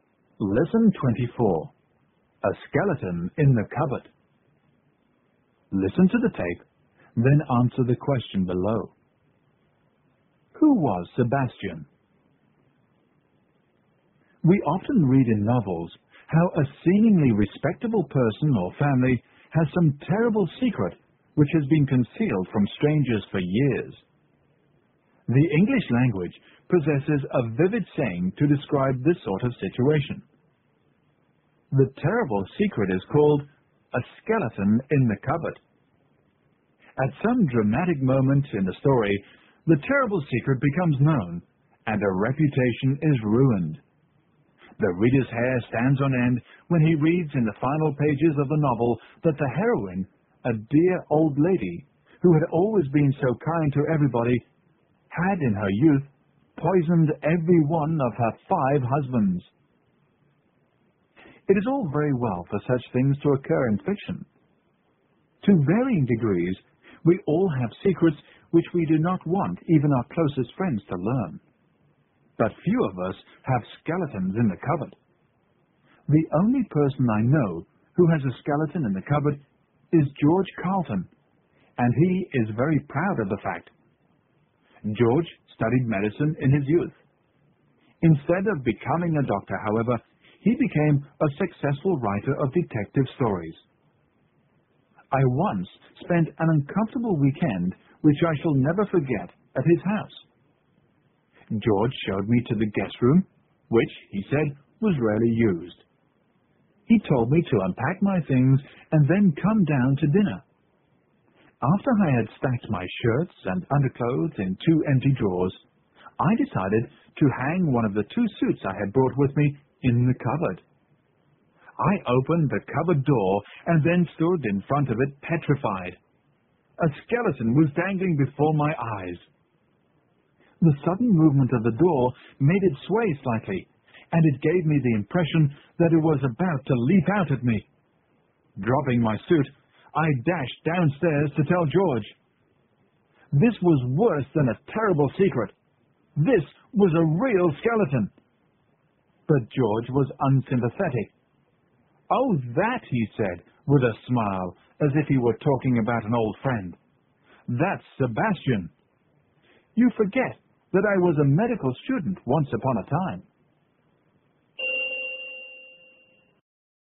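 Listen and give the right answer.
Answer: The skeleton in George's guest-room cupboard, kept from his days as a medical student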